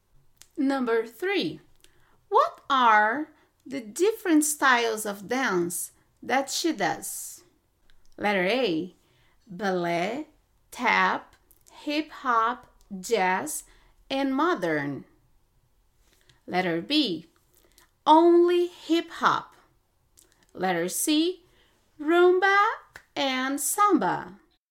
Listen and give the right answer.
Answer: That is correct. Ballet, tap, jazz, hip hop, and modern.